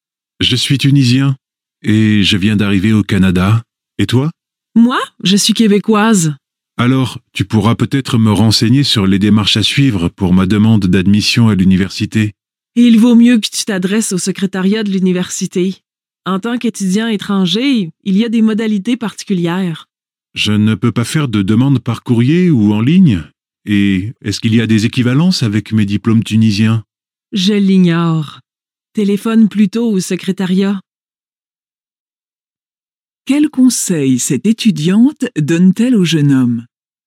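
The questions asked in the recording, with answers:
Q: Quel conseil cette étudiante donne-t-elle au jeune homme?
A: De s'adresser (téléphoner) au secrétariat de l'université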